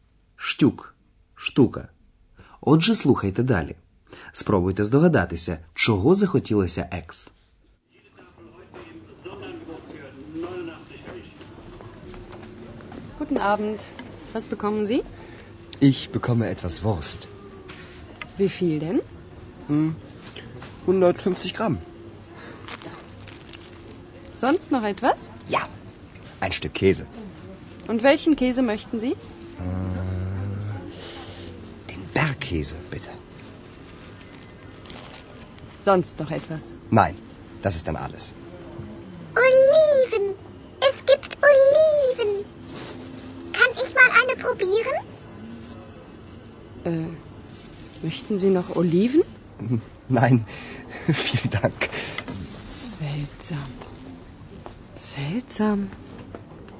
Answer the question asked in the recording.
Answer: Екс побачила оливки, їй дуже захотілося покуштувати одну.